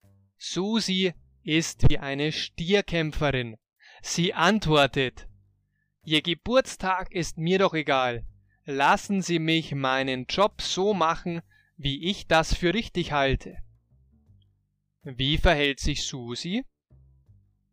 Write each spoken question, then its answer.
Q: Wie verhält sich Susi?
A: Wie eine Stierkämpferin.